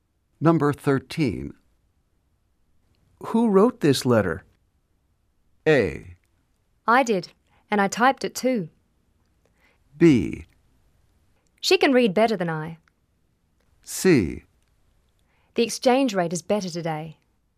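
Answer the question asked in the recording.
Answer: A: I did, and I typed it too.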